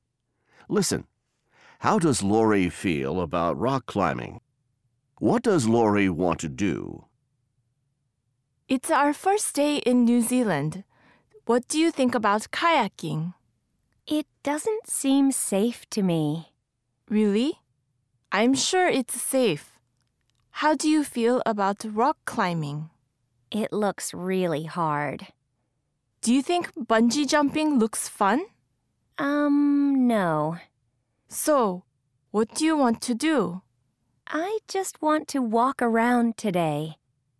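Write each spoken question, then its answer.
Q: How does Lori feel about rock climbing?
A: She thinks it looks really hard.

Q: What does Lori want to do?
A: She just wants to walk around today.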